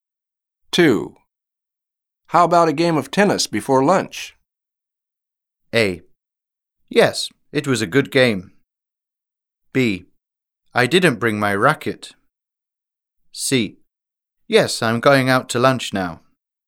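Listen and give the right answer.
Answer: B: I didn't bring my racket.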